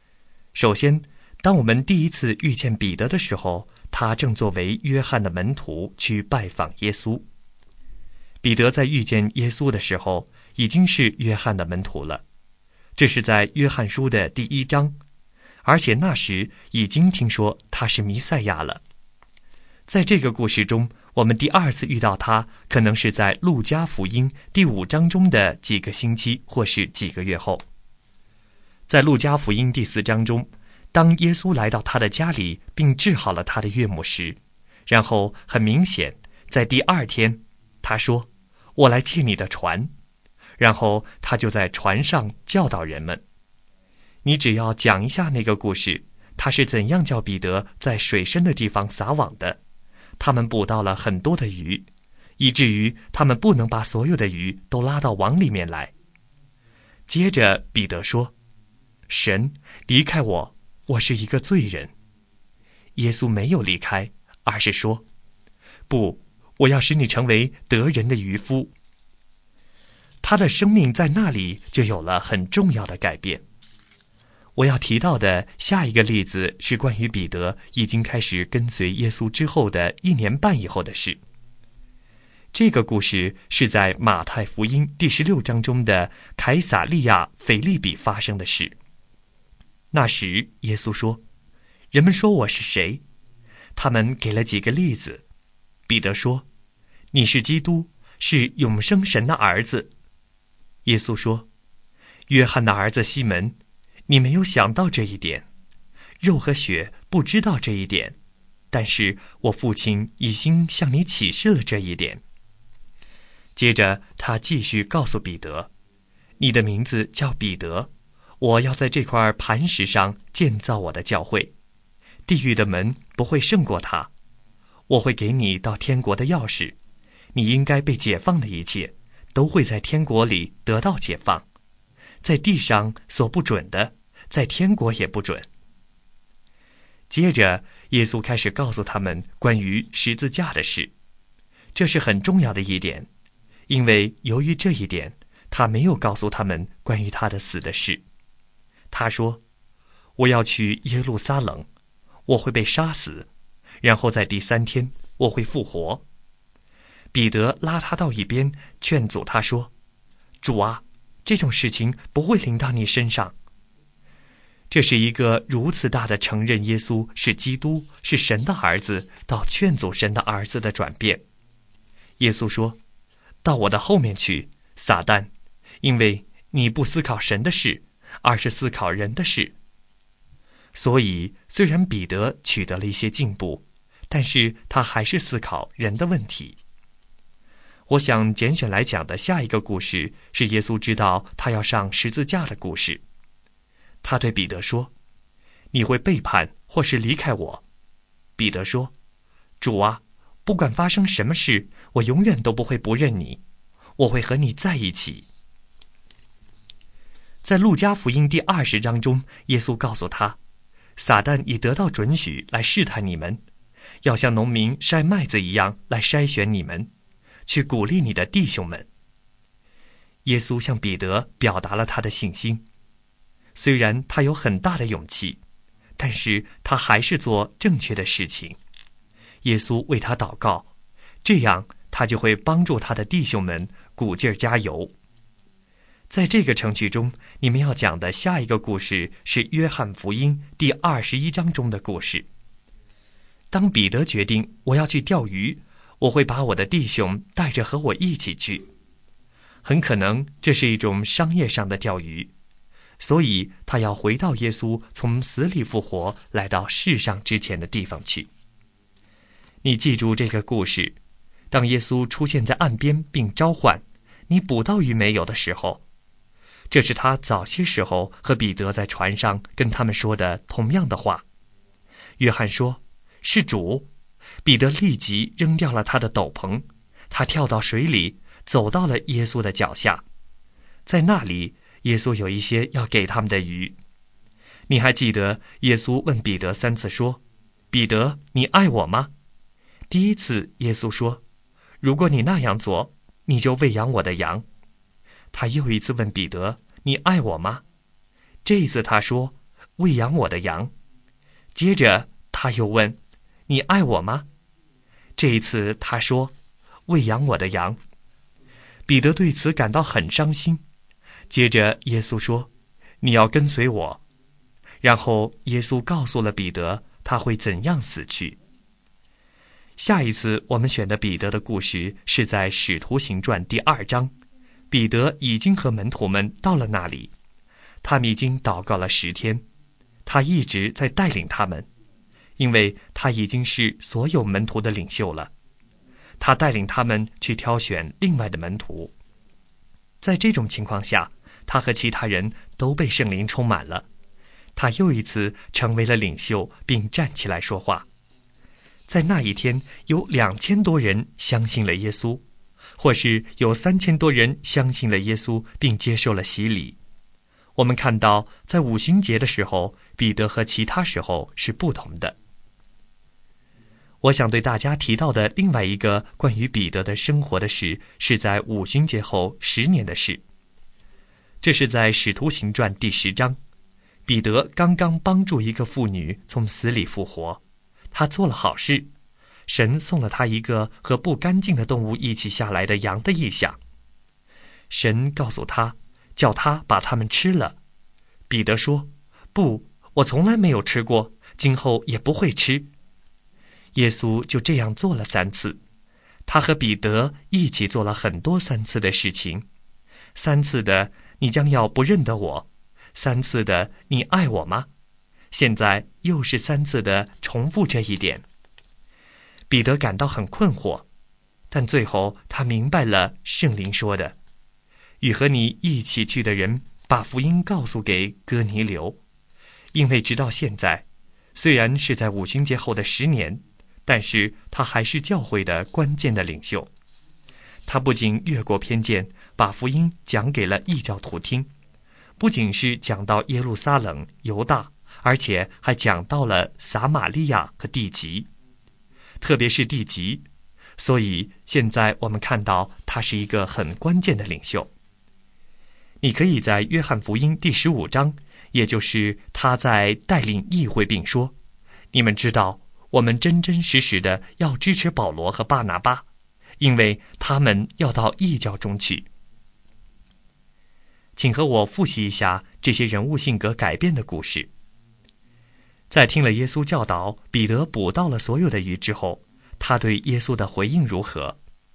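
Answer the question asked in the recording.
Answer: 他说:离开我,我是一个罪人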